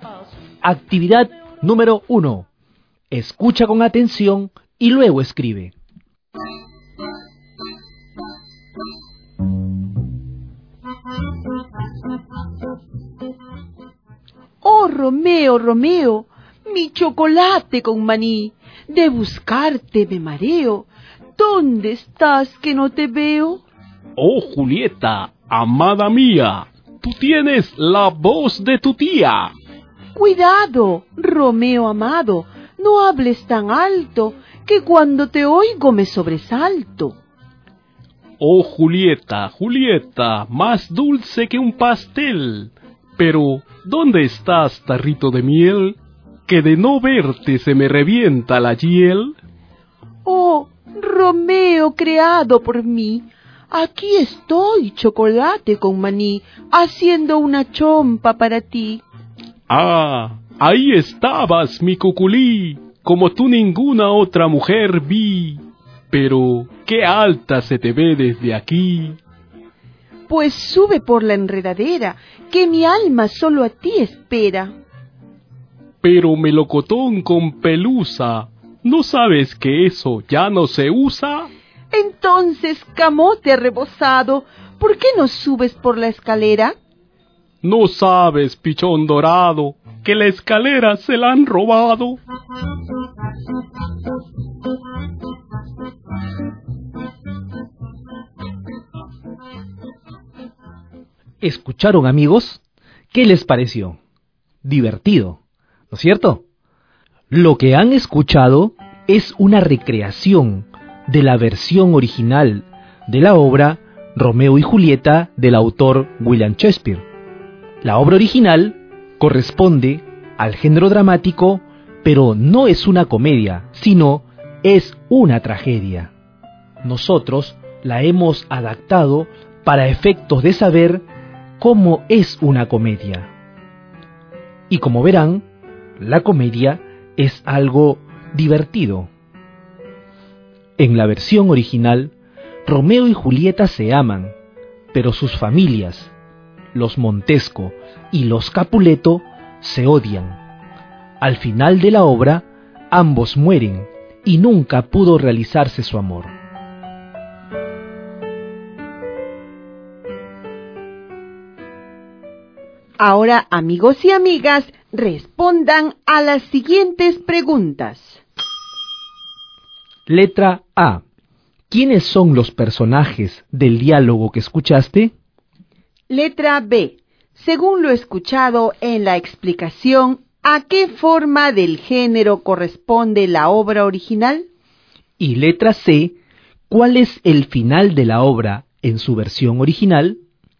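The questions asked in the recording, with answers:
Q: ¿Quiénes son los personajes del diálogo que escuchaste?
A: Romeo y Julieta

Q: Según lo escuchado en la explicación, ¿a qué forma del género corresponde la obra original?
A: En la tragedia se presentan situaciones trágicas, como en la versión original de Romeo y Julieta.

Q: ¿Cuál es el final de la obra en su versión original?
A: Ambos mueren y nunca pudo realizarse su amor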